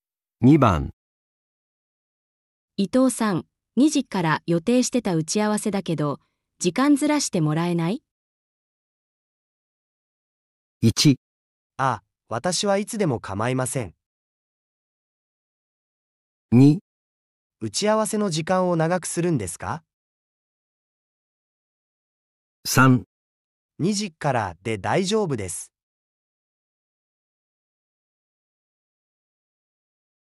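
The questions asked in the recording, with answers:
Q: 伊藤さん、2時から予定してた打ち合わせだけど、時間ずらしてもらえない?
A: 1: あ、私はいつでも構いません。

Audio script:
女:伊藤さん。2時から予定してた打ち合わせだけど、時間ずらしてもらえない?
1.あ、私はいつでも構いません
2.打ち合わせの時間を長くするんですか?
3.2時からで大丈夫です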